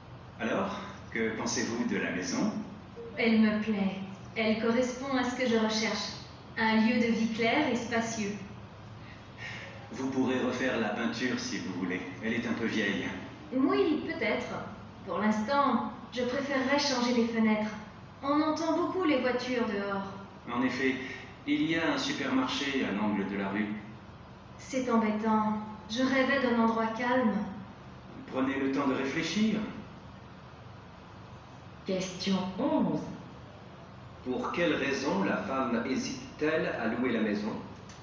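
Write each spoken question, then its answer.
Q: Pour quelle raison la femme hésite-t-elle à louer la maison ?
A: Parce qu'elle est bruyante : on entend beaucoup les voitures, et elle voulait un endroit calme.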